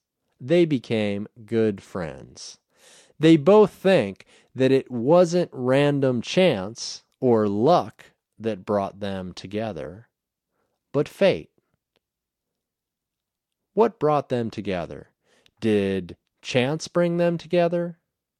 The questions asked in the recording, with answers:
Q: Did chance bring them together?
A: No. Chance didn't bring them together.